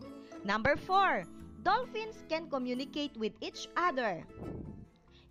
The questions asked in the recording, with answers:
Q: Dolphins can communicate with each other.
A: Yes, exactly. It is a fact.